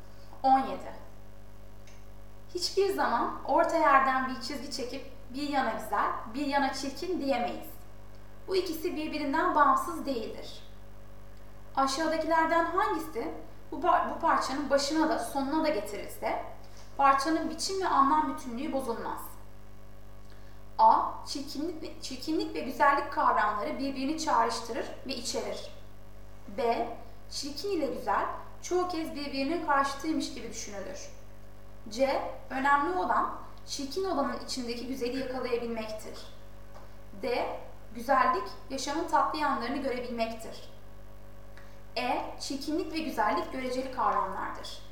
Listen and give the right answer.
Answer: Doğru yanıt A.